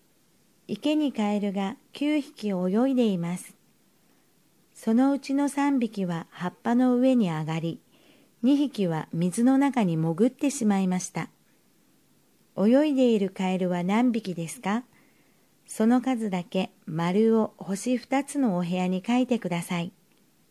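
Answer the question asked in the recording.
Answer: 4匹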